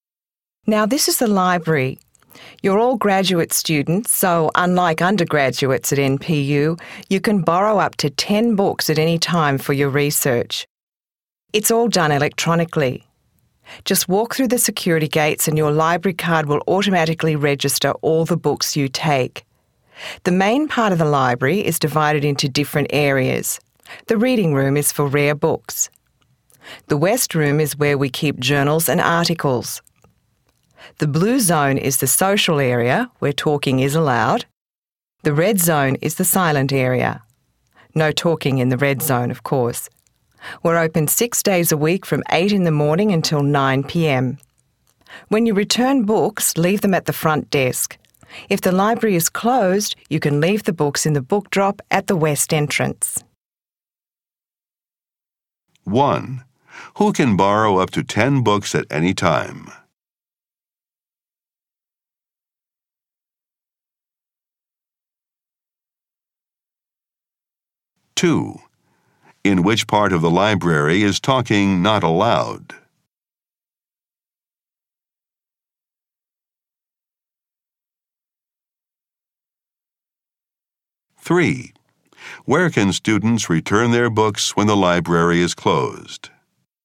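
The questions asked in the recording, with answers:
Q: Who can borrow up to 10 books at any time?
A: Graduate students

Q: In which part of the library is talking not allowed?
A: The red zone

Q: Where can students return their books when the library is closed?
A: In the book drop at the west entrance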